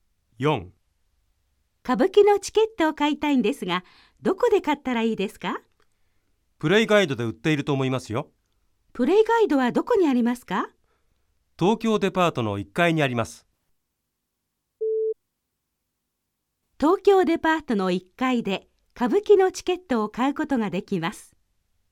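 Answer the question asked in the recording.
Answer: ○(正しい)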